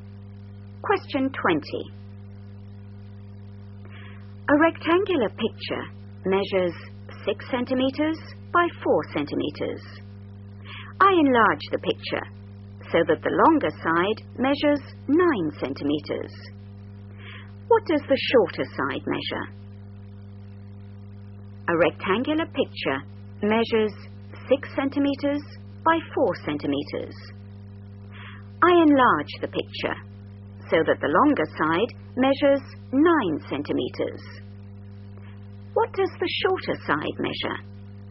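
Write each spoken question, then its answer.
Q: What does the shorter side measure?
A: 6 cm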